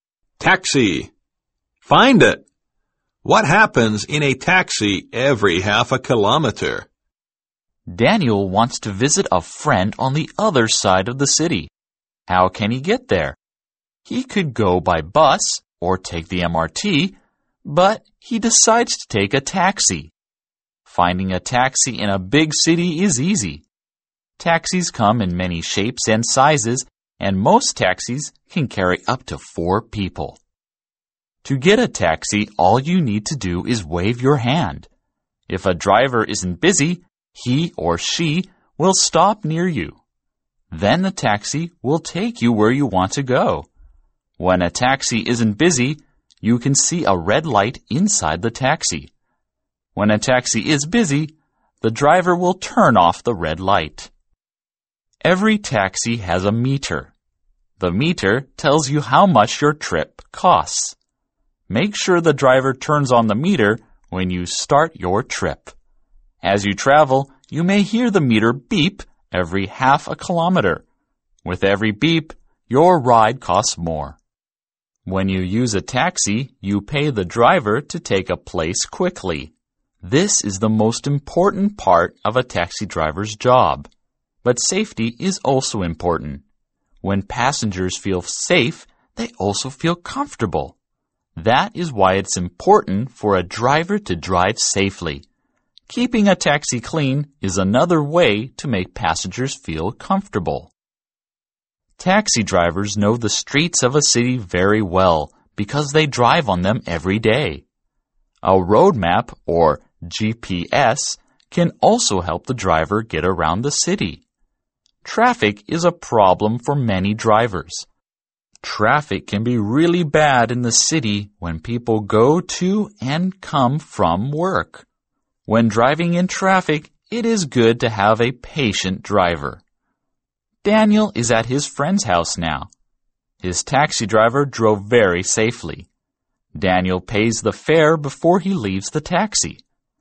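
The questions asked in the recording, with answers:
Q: What happens in a taxi every half a kilometer?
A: The meter beeps and the ride costs more.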